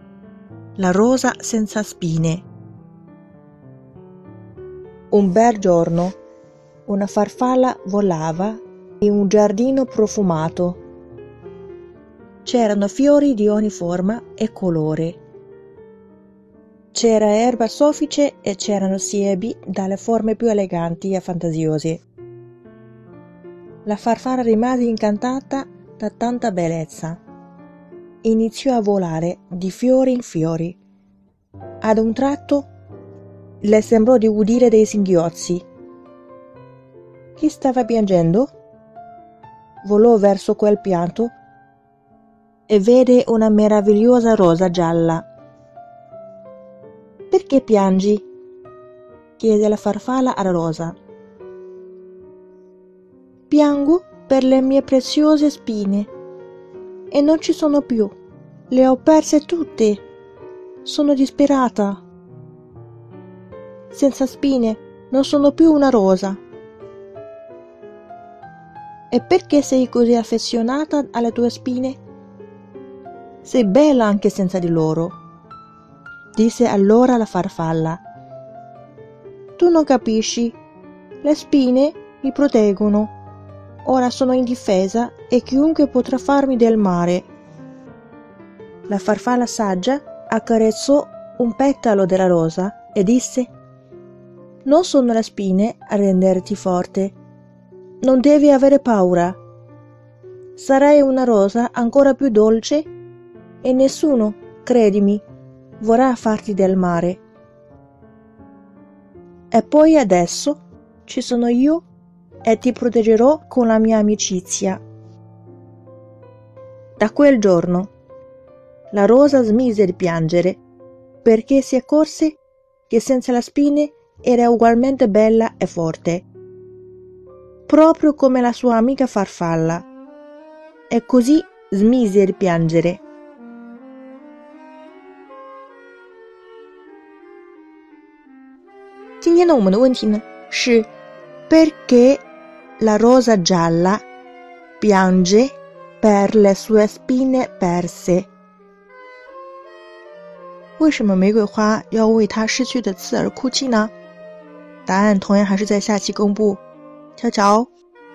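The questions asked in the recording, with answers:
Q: La rosa gialla piange per le sue spine perse.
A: Perché le spine la proteggevano; senza di loro si sente indifesa e teme che chiunque possa farle del male.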